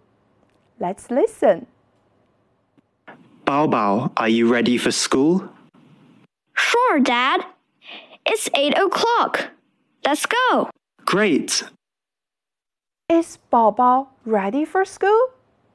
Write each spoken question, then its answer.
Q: Is Bao Bao ready for school?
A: Yes, Bao Bao is ready for school.